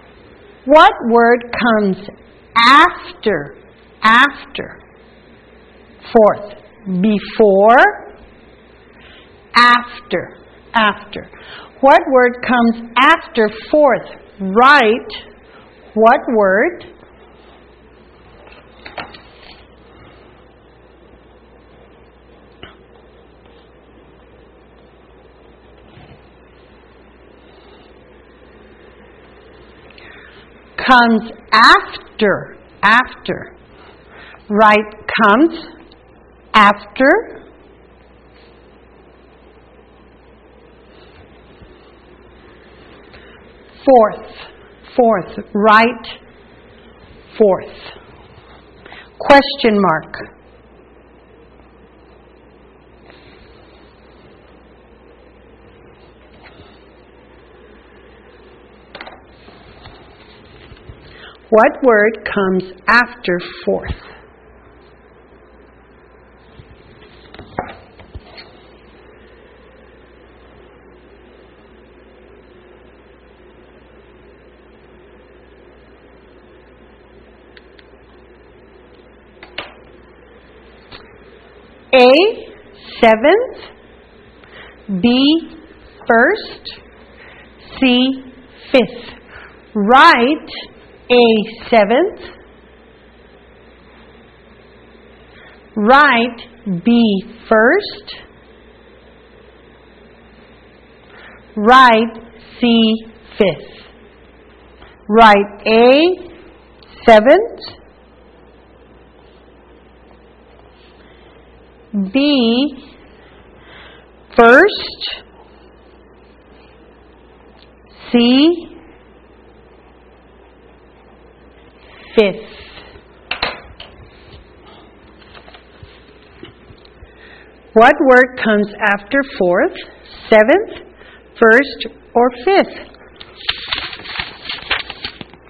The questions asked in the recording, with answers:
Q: What word comes after fourth?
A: Fifth comes after fourth.